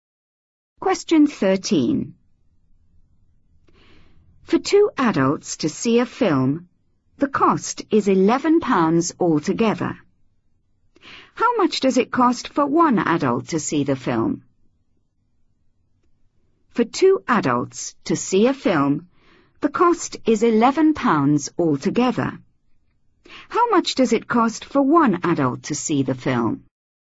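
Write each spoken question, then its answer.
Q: How much does it cost for one adult to see the film?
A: £5.50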